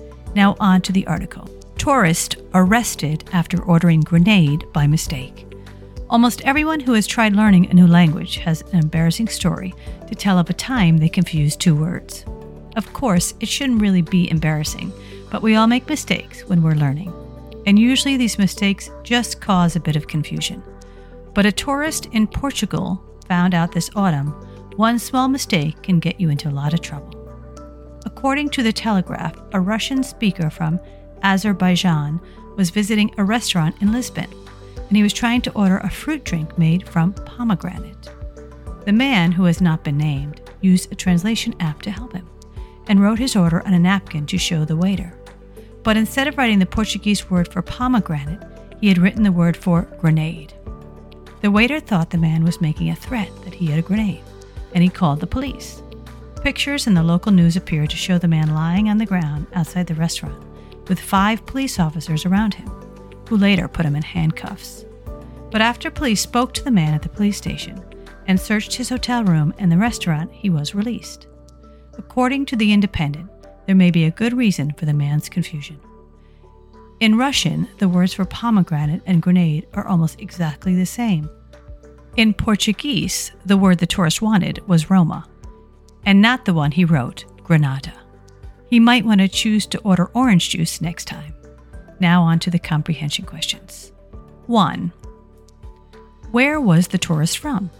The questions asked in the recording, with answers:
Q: Where was the tourist from?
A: Azerbaijan.